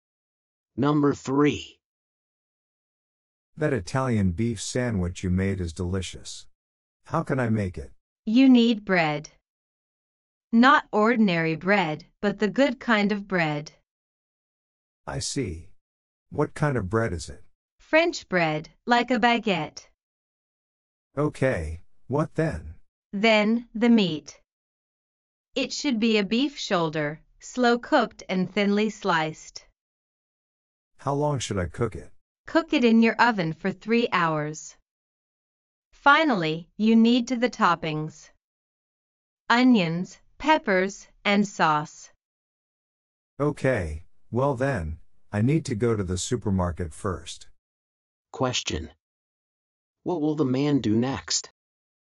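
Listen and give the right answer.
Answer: Go to the supermarket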